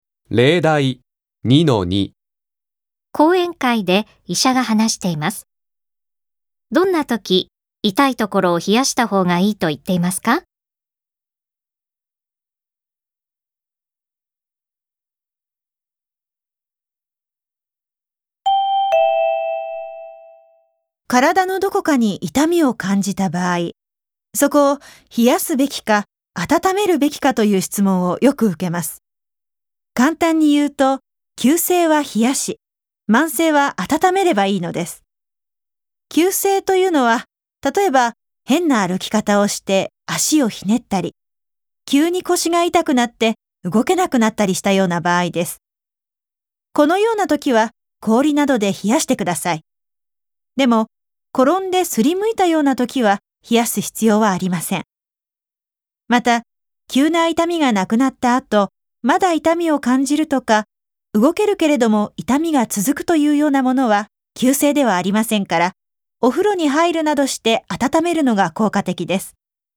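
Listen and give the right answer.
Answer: 急性の痛みの時(足をひねったり、急に腰が痛くなって動けなくなったりした時)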